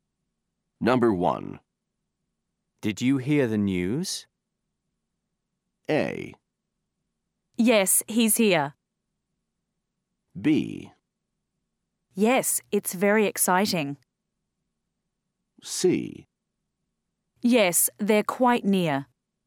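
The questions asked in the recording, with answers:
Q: Did you hear the news?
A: B: Yes, it's very exciting.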